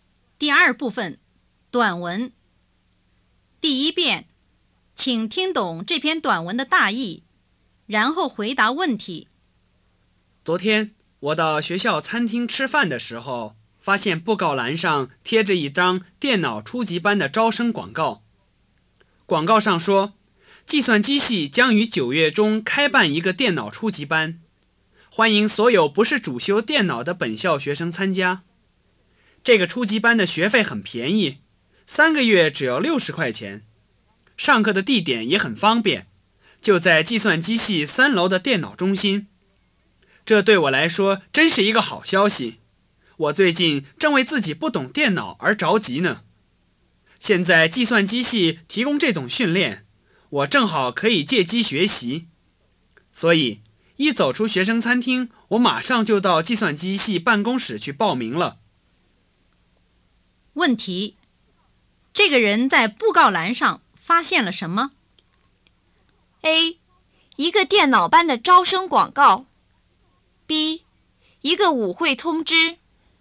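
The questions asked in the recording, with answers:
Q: 问题,这个人在布告栏上发现了什么?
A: A: 一个电脑班的招生广告。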